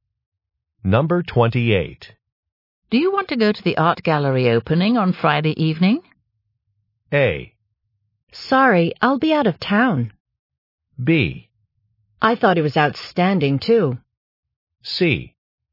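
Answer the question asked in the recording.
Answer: A: Sorry, I'll be out of town.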